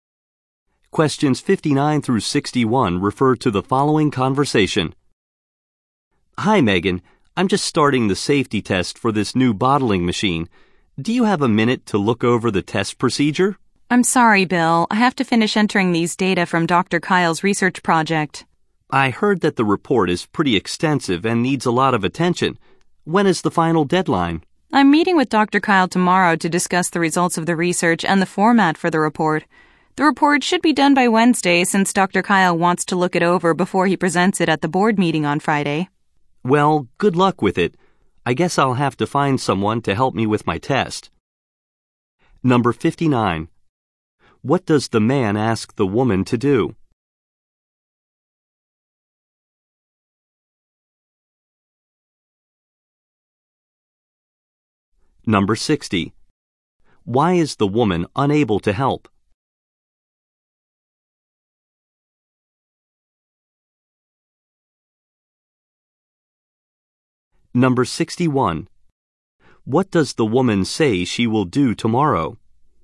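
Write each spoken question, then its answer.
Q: What does the man ask the woman to do?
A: Look over the test procedure

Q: Why is the woman unable to help?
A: She has to finish entering research data

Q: What does the woman say she will do tomorrow?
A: Meet with Dr. Kyle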